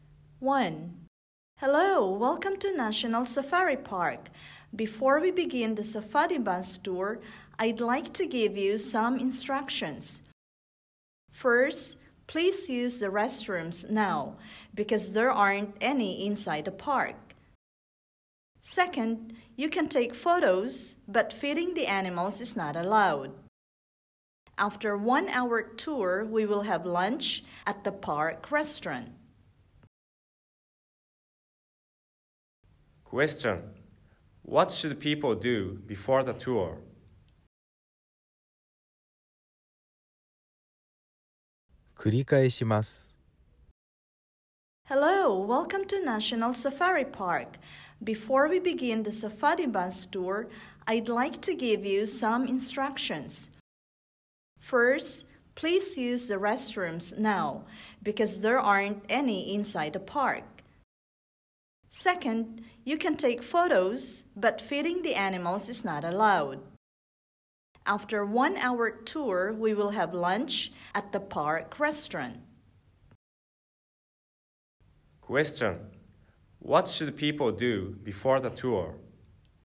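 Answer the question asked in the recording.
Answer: Use the restrooms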